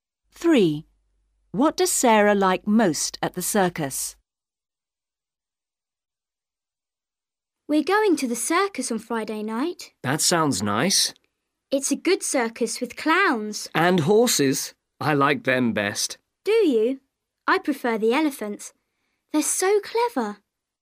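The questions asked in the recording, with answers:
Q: What does Sarah like most at the circus?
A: the horses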